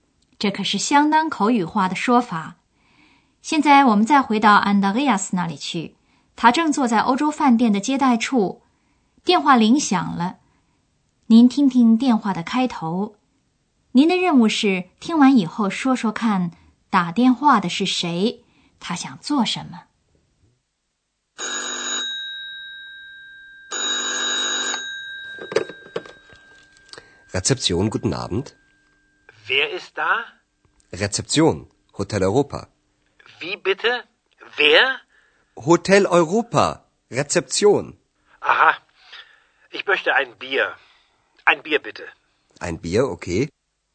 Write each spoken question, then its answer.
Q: 他想做什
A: 原来打电话的人跟 Andreas 要一个啤酒 ,ein Bier.